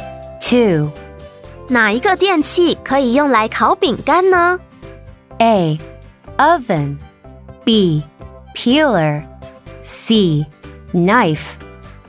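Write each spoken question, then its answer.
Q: 哪一个电器可以用来烤饼干呢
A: A: Oven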